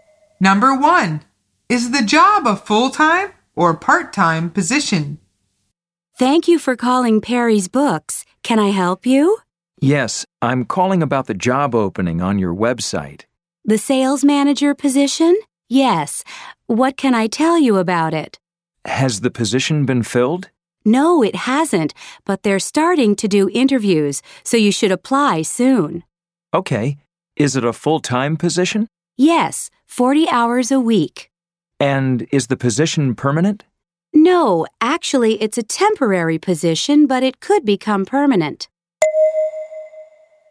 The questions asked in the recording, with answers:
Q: Number one, is the job a full-time or part-time position?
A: The answer is full-time.